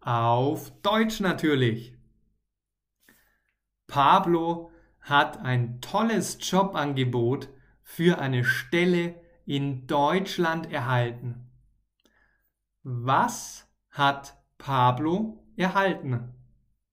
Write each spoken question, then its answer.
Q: Was hat Pablo erhalten?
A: Ein tolles Jobangebot. Er hat ein tolles Jobangebot erhalten.